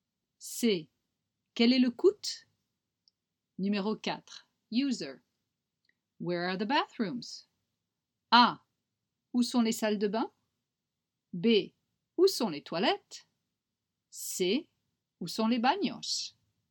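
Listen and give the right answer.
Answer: B: Où sont les toilettes?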